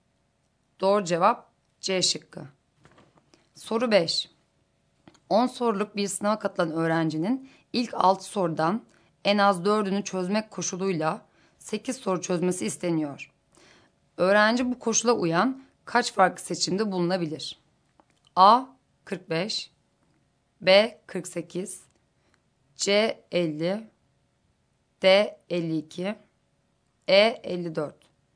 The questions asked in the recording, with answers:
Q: Öğrenci bu koşula uyan kaç farklı seçimde bulunabilir?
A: Doğru cevap A şıkkı.